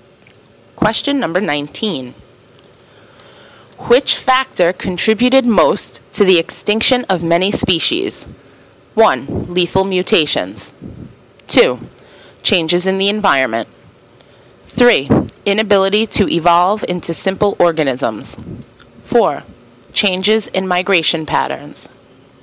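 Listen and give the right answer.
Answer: 2: Changes in the environment.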